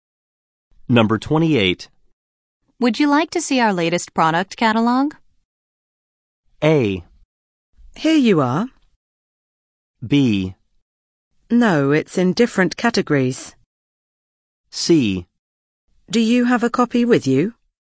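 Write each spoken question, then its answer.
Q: Would you like to see our latest product catalog?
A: C: Do you have a copy with you?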